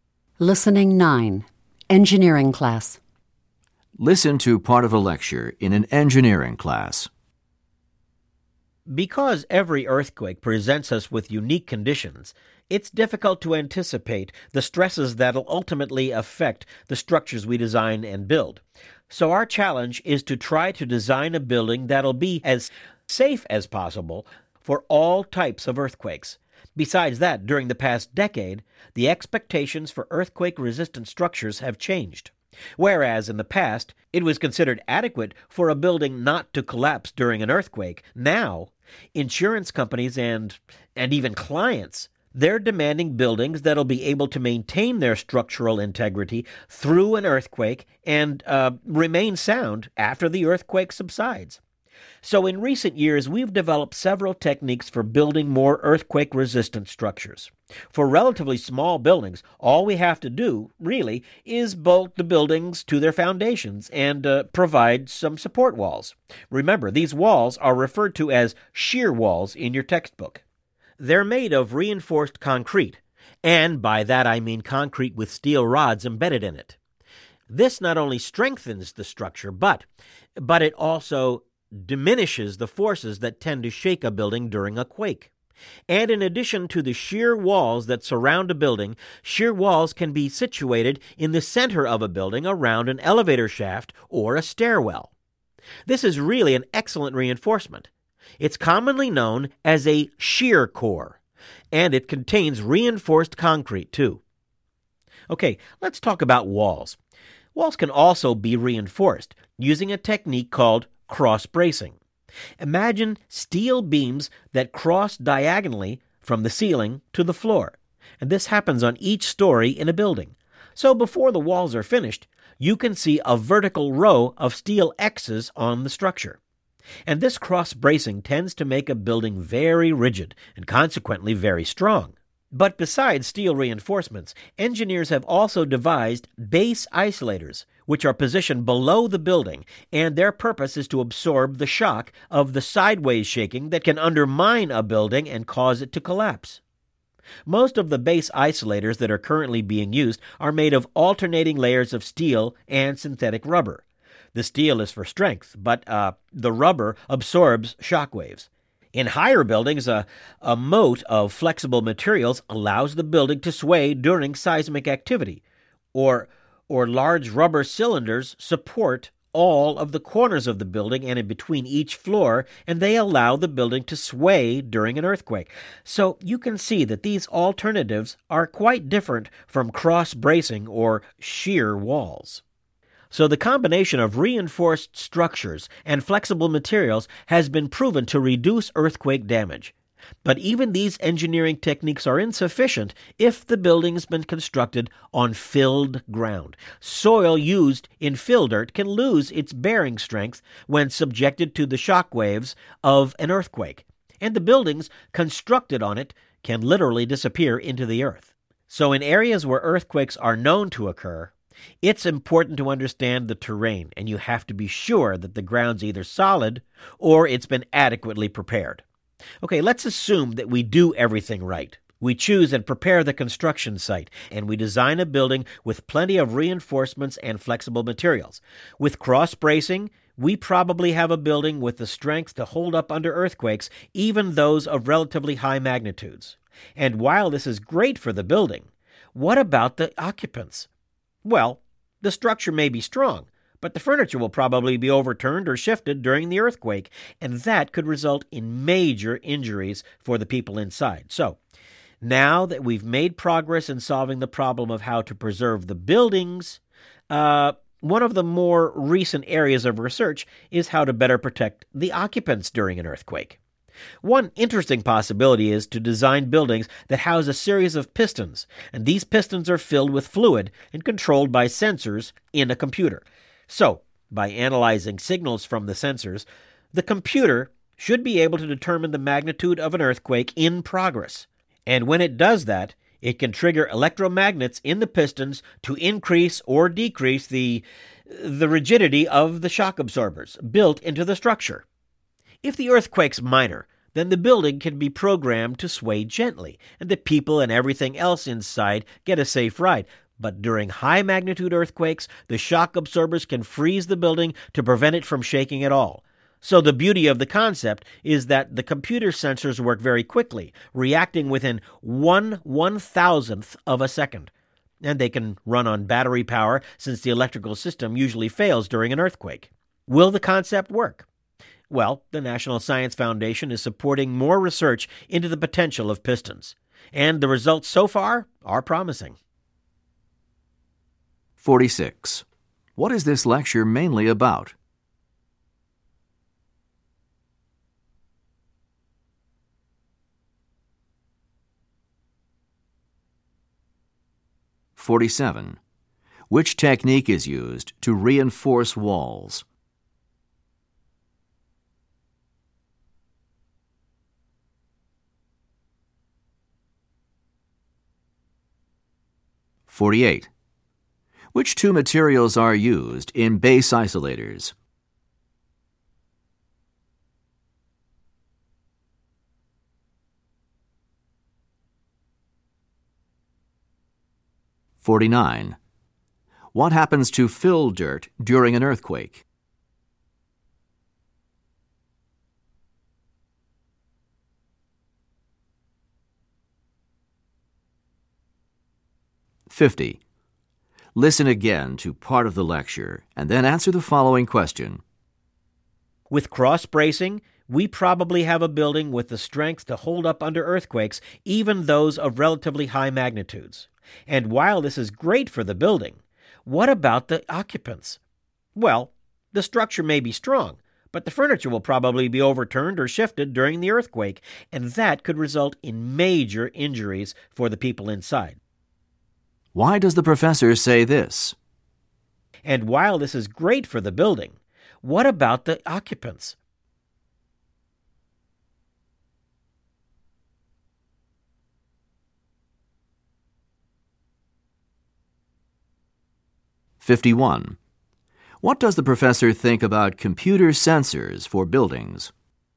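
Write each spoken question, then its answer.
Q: What is this lecture mainly about?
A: Techniques for building earthquake-resistant structures

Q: Which technique is used to reinforce walls?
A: Cross-bracing

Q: Which two materials are used in base isolators?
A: Steel and synthetic rubber

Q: What happens to fill dirt during an earthquake?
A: It loses its bearing strength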